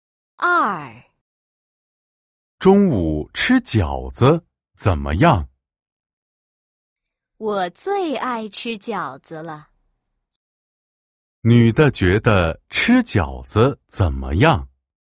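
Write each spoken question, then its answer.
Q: 女的觉得吃饺子怎么样?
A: 很好,她最爱吃饺子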